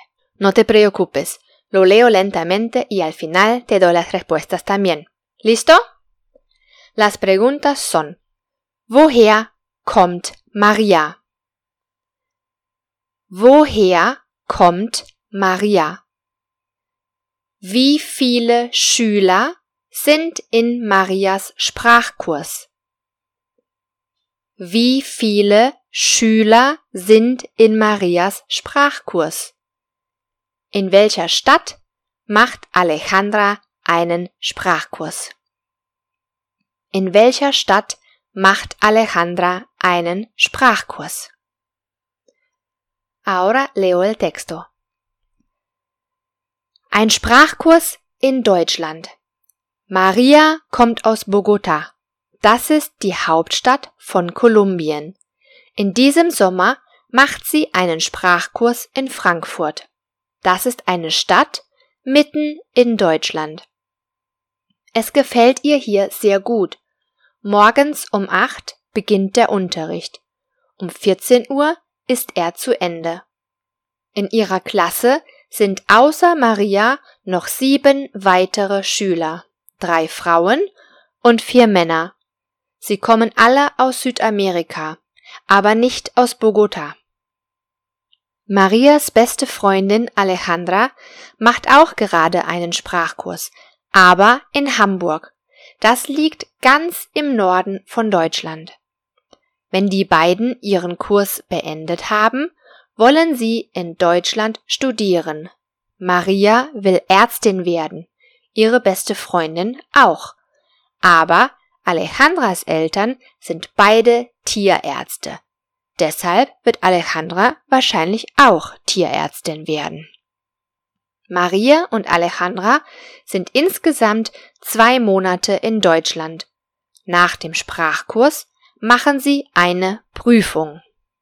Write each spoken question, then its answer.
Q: Woher kommt Maria?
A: Maria kommt aus Bogotá, Kolumbien.

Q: Wie viele Schüler sind in Marias Sprachkurs?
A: Acht.

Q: In welcher Stadt macht Alejandra einen Sprachkurs?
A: In Hamburg.